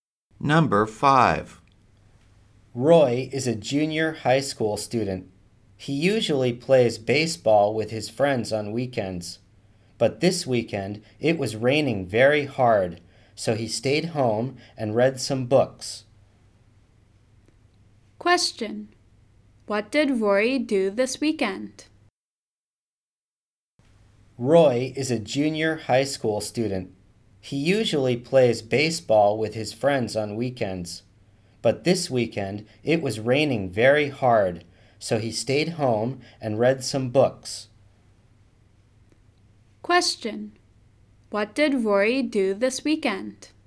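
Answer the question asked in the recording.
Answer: He stayed home and read some books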